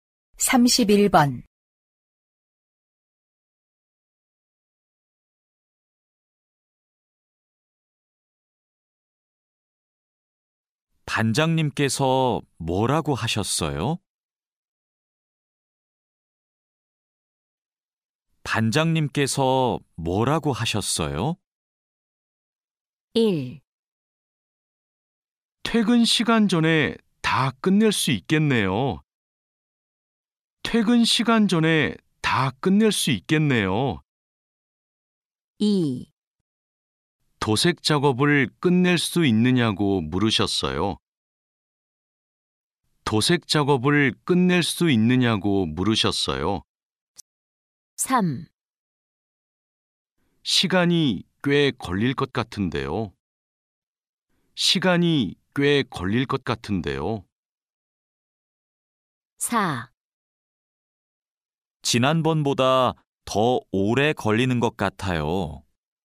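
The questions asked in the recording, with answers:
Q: 반장님께서 뭐라고 하셨어요?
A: 2: 도색 작업을 끝낼 수 있느냐고 물으셨어요.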